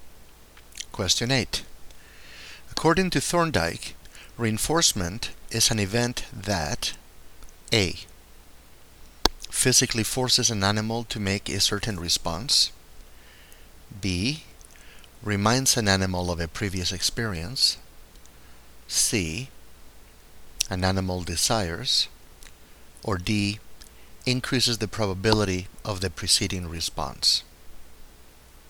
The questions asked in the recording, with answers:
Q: According to Thorndike, reinforcement is an event that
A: And the correct choice is D.